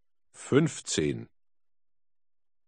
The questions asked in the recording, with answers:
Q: 13 und 4 macht wie viel?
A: 17.